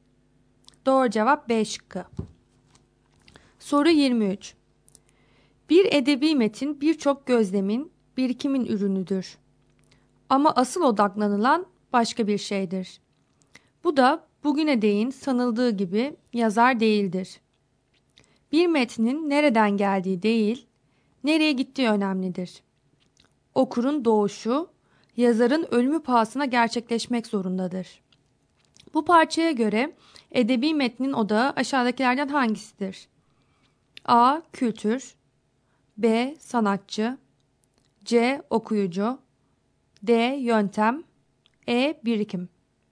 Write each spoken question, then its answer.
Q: Bu parçaya göre edebi metnin odağı aşağıdakilerden hangisidir?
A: Doğru cevap C şıkkı.